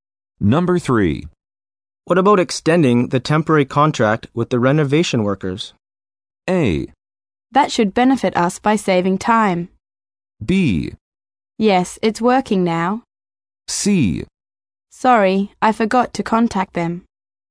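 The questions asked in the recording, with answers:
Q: What about extending the temporary contract with the renovation workers?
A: A: That should benefit us by saving time.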